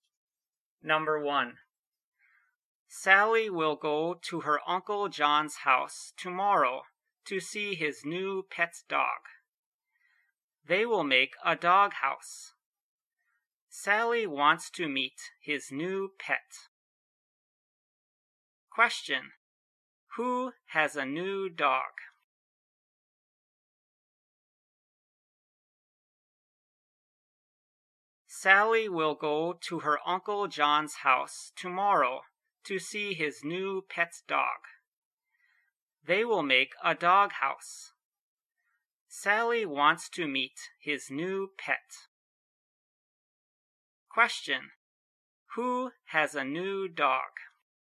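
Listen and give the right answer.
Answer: Sally's Uncle John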